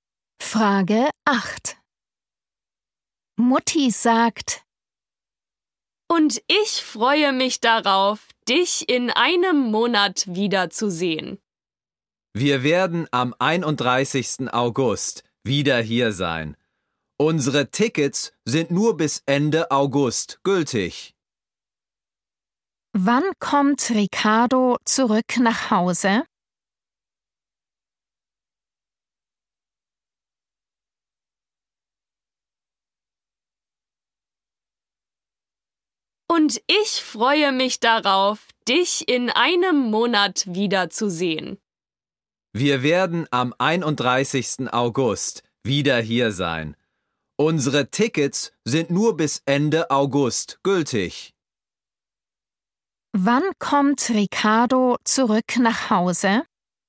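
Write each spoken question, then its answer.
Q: Wann kommt Ricardo zurück nach Hause?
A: am 31. August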